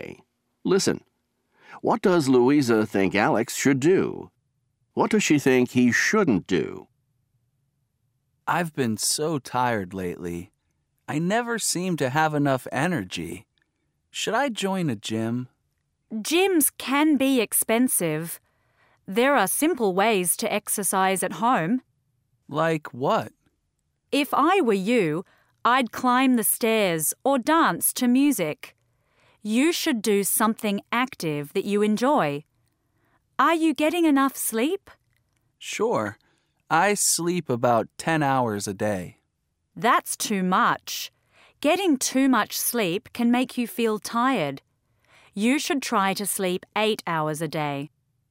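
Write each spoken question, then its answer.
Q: What does Louisa think Alex should do?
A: Exercise at home, like climbing stairs or dancing to music, and sleep 8 hours a day

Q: What does she think he shouldn't do?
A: Join a gym or sleep too much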